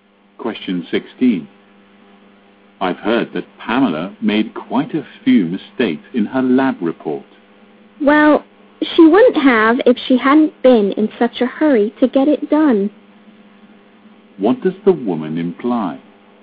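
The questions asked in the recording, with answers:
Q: What does the woman imply?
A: Pamela made mistakes because she was in too much of a hurry.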